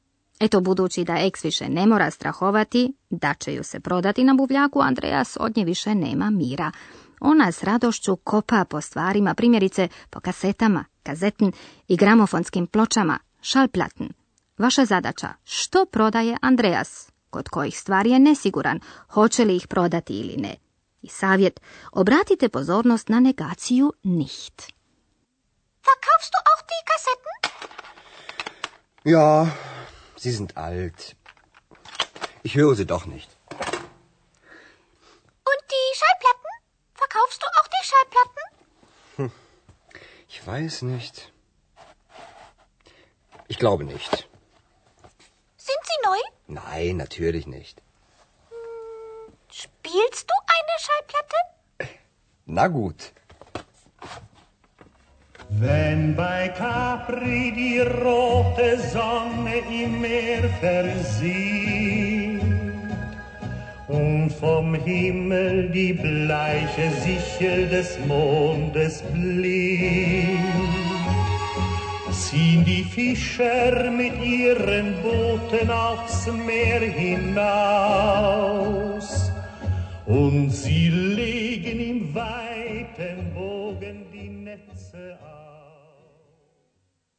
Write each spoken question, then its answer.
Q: Vaša zadaća, što prodaje Andreas,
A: Andreas želi prodati kasete,

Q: kod kojih stvari je nesiguran, hoće li ih prodati ili ne.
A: a za gramofonske ploče još ni sam ne zna.